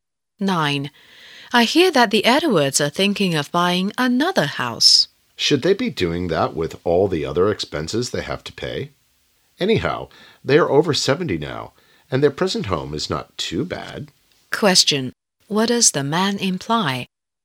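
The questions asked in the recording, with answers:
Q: What does the man imply?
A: The Edwards shouldn't buy another house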